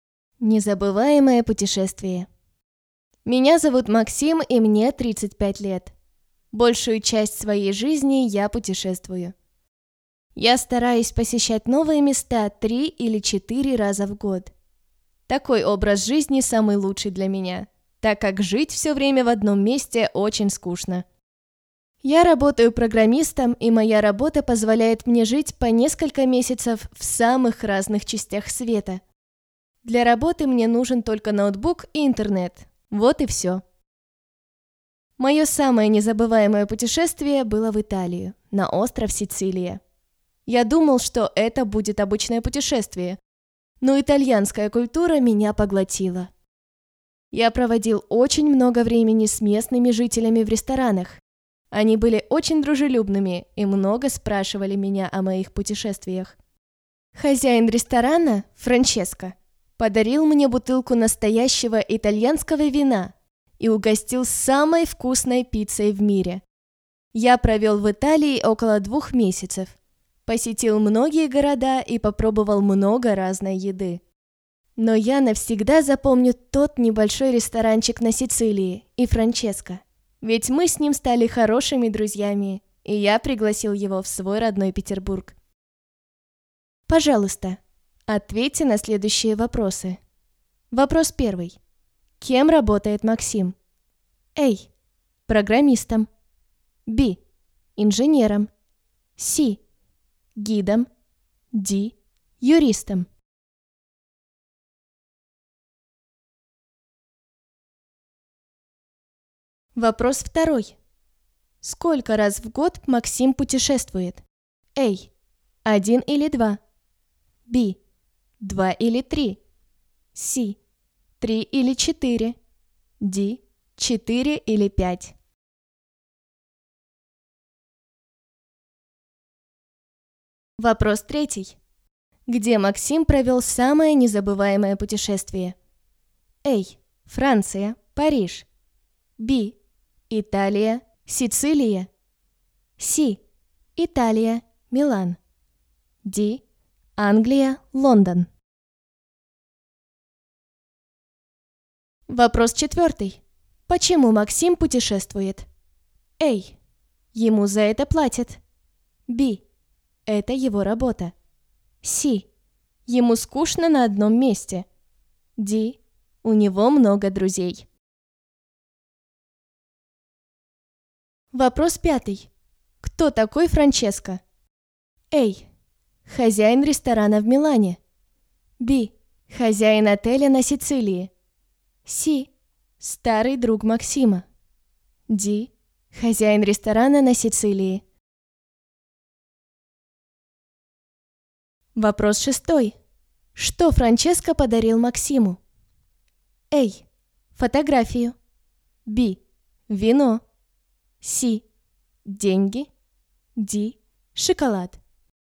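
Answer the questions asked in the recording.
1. A: Программистом.
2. C: 3 или 4.
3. B: Италия, Сицилия.
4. C: Ему скучно на одном месте.
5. D: Хозяин ресторана на Сицилии.
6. B: Вино.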